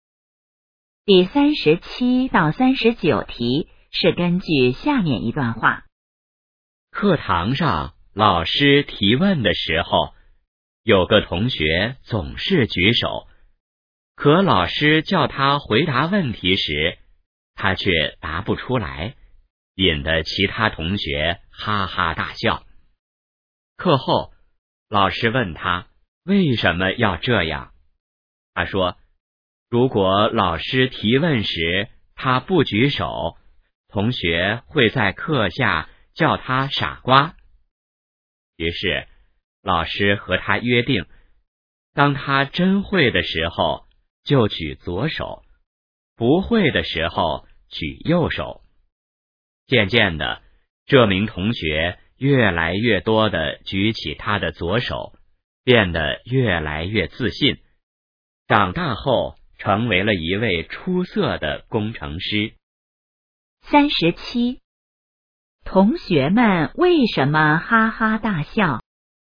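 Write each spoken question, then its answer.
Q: 同学们为什么哈哈大笑?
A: 他举手了却答不出问题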